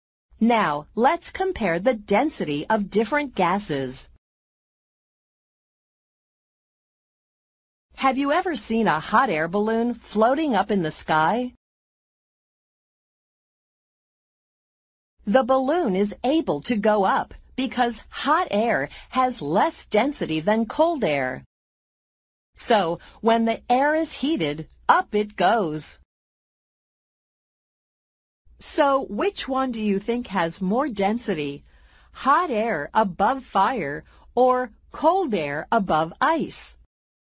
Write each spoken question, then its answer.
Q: So, which one do you think has more density?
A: Cold air above ice is denser than hot air above fire.